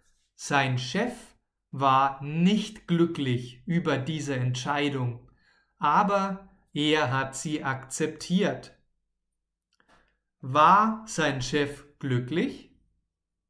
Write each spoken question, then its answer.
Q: War sein Chef glücklich?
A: Nein, nein, nein, sein Chef war nicht glücklich.